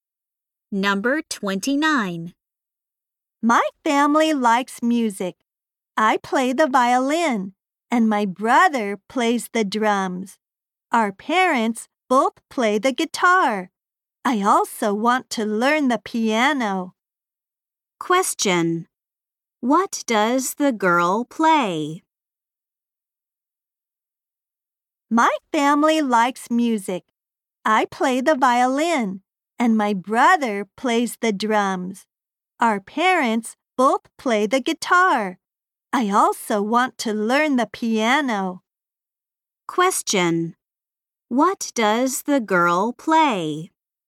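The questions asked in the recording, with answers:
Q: What does the girl play?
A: The violin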